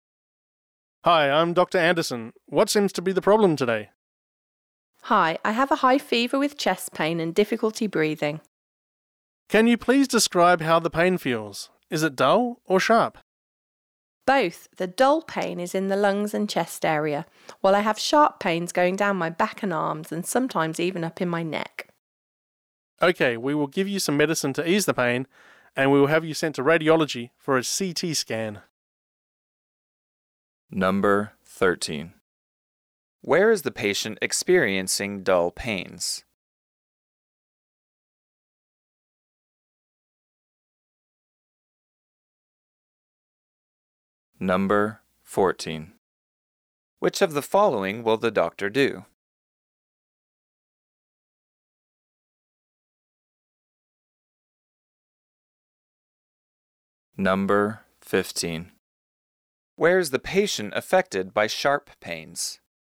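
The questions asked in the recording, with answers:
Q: Where is the patient experiencing dull pains?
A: In the lungs and chest area

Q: Where is the patient affected by sharp pains?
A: Down the back and arms, and sometimes up in the neck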